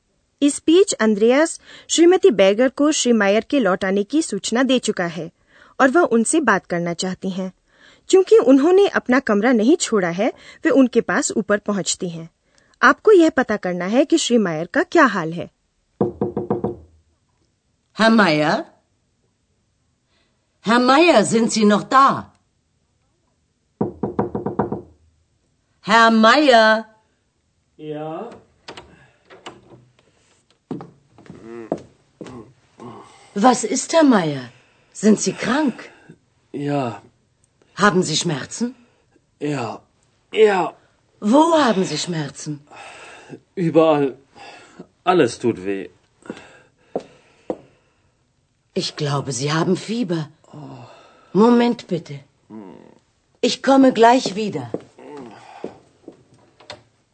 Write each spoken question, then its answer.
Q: आपको यह पता करना है कि श्री मायर का क्या हाल है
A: श्री मायर का हाल ठीक नहीं है वे बीमार हैं